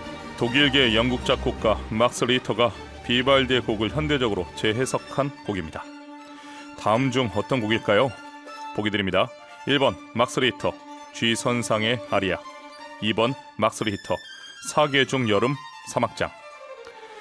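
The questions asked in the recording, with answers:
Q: 다음 중 어떤 곡일까요?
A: 2번: 막스 리터 사계중 여름 사막장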